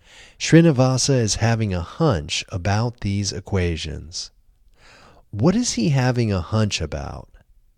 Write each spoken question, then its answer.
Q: What is he having a hunch about?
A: He is having a hunch about these equations.